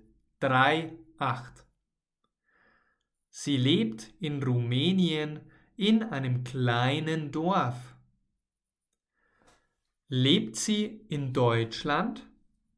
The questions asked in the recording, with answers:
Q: Lebt sie in Deutschland?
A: Nein, sie lebt nicht in Deutschland, sondern in Rumänien.